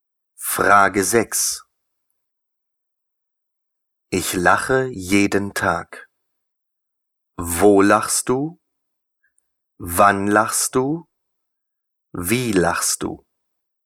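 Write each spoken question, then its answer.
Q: Ich lache jeden Tag.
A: Wann lachst du?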